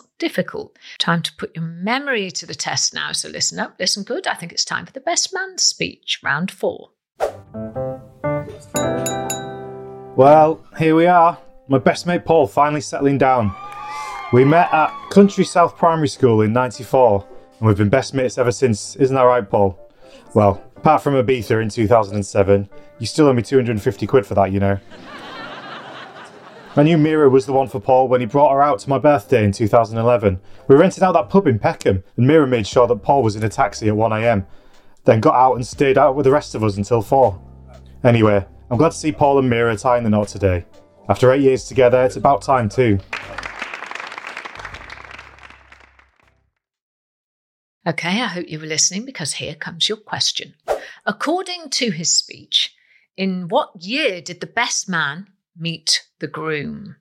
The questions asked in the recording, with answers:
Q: According to his speech, in what year did the best man meet the groom?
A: they met at school in 1994.